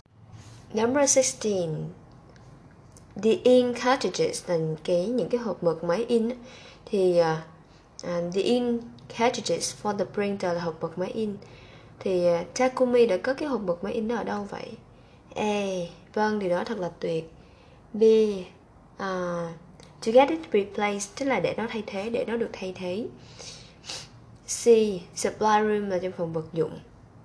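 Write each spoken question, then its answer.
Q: Thì Takumi đã có cái hộp mực máy in đó ở đâu vậy?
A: C: Supply room là trong phòng vật dụng.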